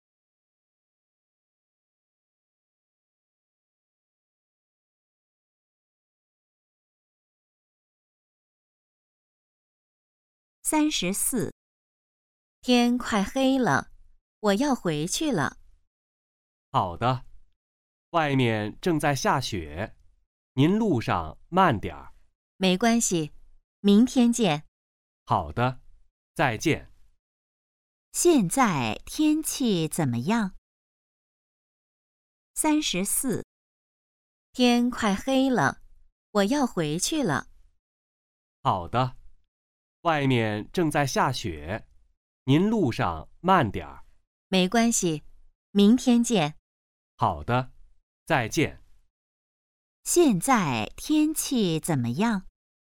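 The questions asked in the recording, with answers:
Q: 现在天气怎么样?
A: 正在下雪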